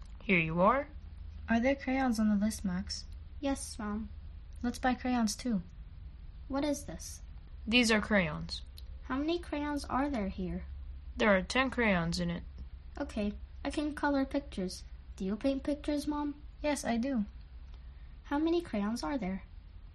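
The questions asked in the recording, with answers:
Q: How many crayons are there?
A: 10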